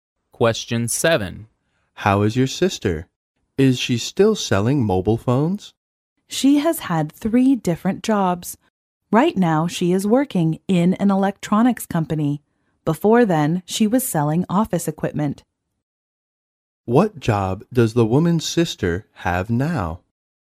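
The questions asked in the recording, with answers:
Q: What job does the woman's sister have now?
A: She works in an electronics company.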